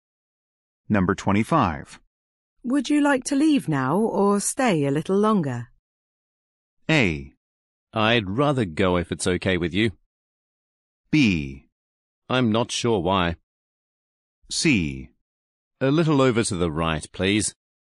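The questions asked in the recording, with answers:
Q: Would you like to leave now or stay a little longer?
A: A: I'd rather go if it's okay with you.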